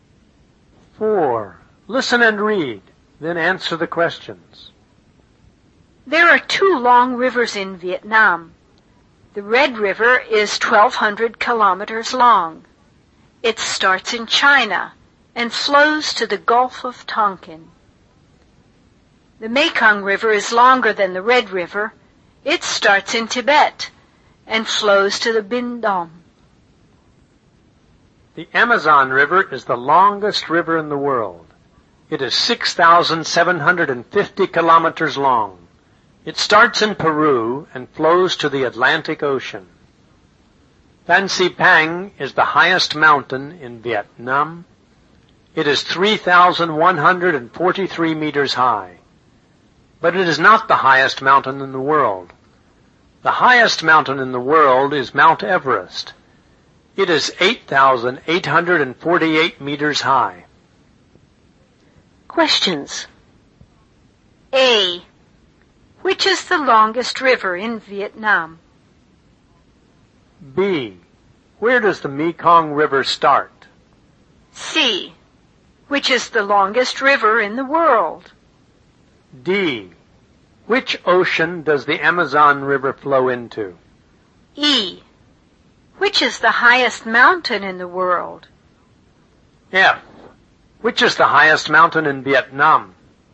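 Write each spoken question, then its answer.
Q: Which is the longest river in Vietnam?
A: The Mekong River

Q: Where does the Mekong River start?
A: In Tibet

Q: Which is the longest river in the world?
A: The Amazon River

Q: Which ocean does the Amazon River flow into?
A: The Atlantic Ocean

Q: Which is the highest mountain in the world?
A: Mount Everest

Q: Which is the highest mountain in Vietnam?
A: Phan Xi Pang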